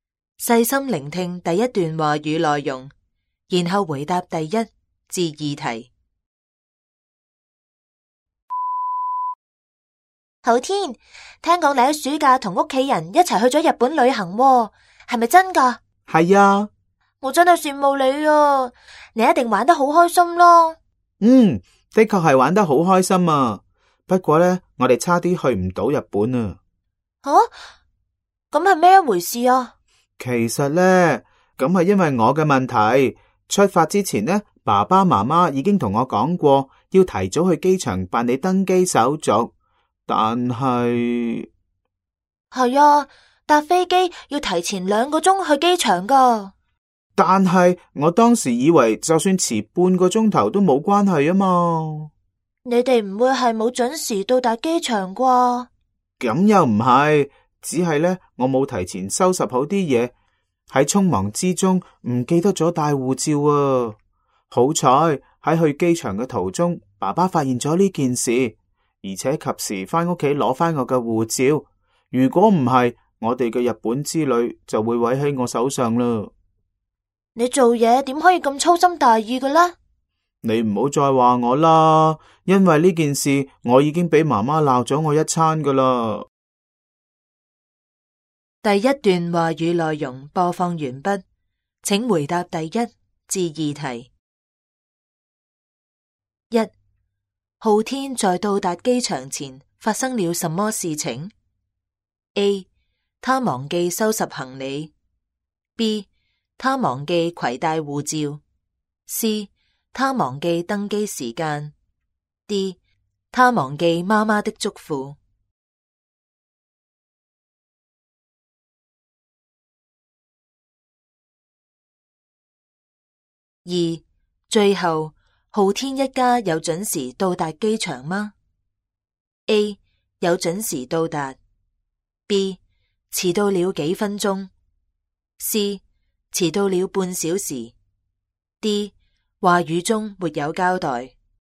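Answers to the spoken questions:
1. B: 他忘记携带护照。
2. A: 有准时到达。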